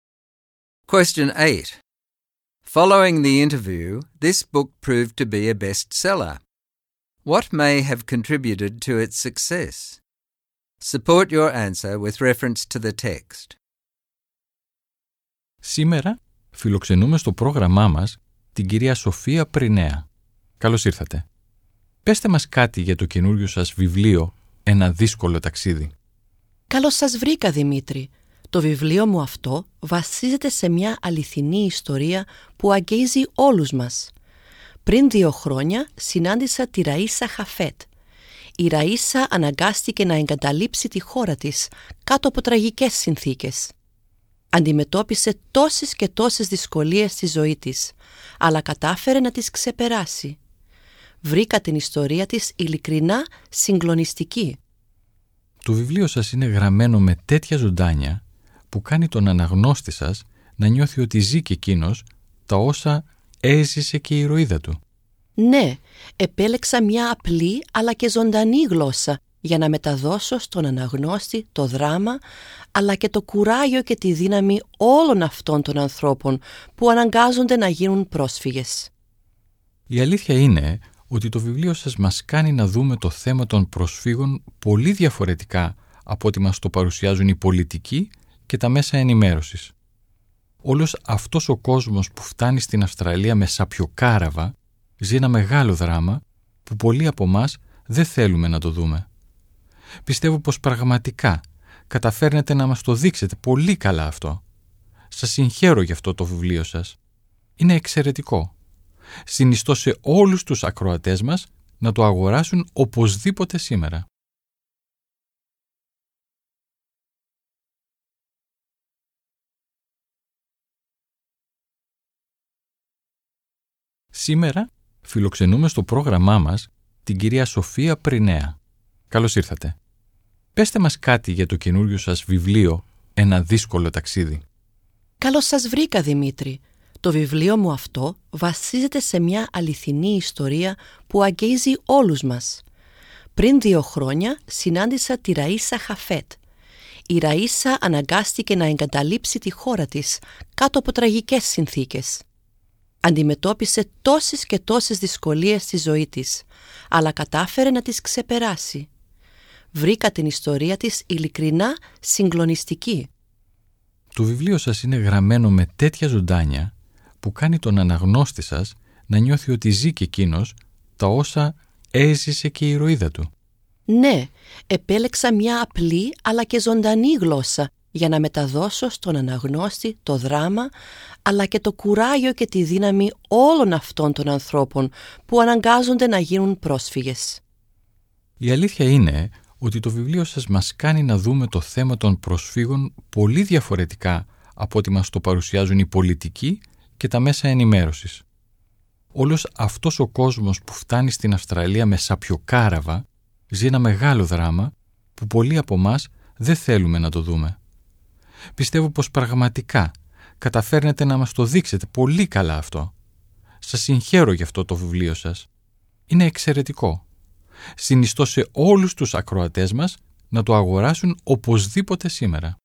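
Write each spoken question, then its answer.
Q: What may have contributed to its success?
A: It is based on a moving true story (Raisa Hafet's) that touches everyone. It is written in simple, vivid language that makes readers live the refugees' experience. It shows the refugee issue differently from how politicians and the media present it, and the interviewer praised it and urged listeners to buy it.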